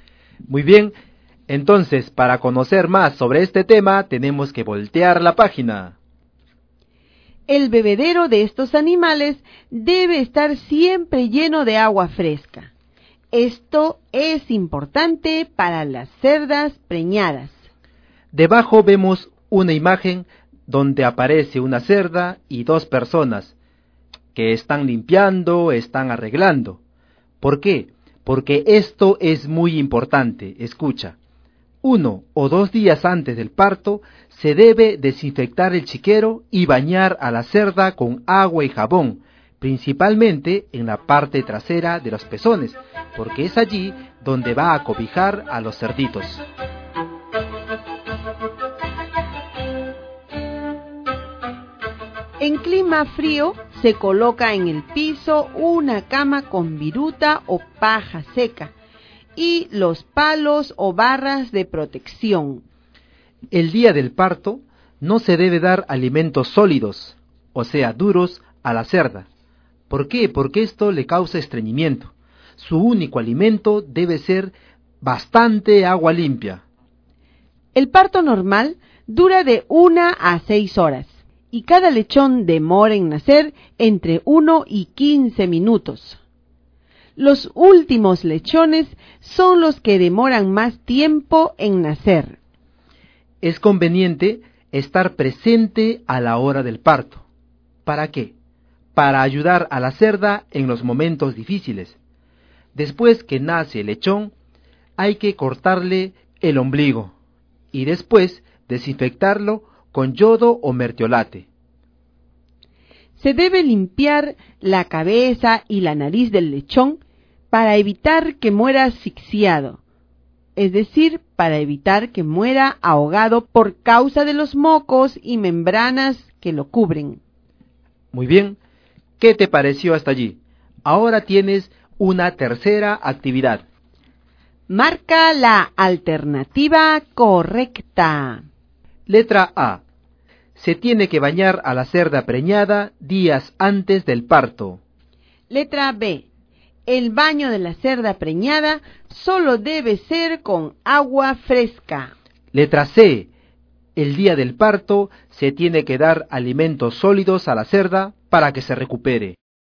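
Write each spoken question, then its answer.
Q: Marca la alternativa correcta.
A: A: Se tiene que bañar a la cerda preñada días antes del parto.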